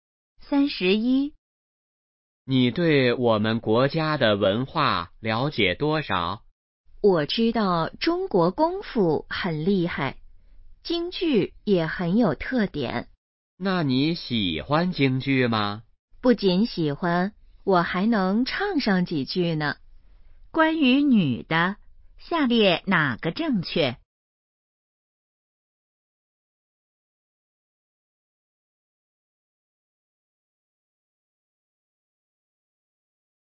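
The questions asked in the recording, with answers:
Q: 下列哪个正确?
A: 女的喜欢京剧,还会唱几句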